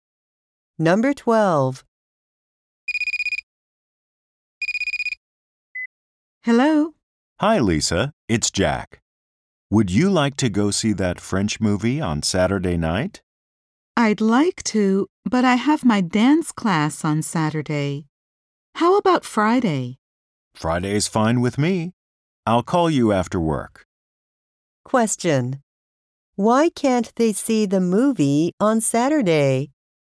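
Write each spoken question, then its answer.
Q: Why can't they see the movie on Saturday?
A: Lisa has her dance class on Saturday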